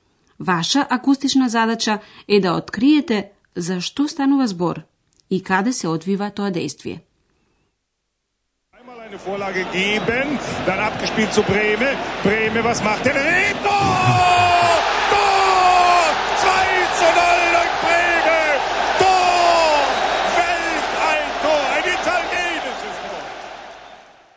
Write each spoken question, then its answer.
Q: Ваша акустична задача е да откриете за што станува збор и каде се одвива тоа действие.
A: станува збор за спортски настан, поточно речено за фудбалски надпревар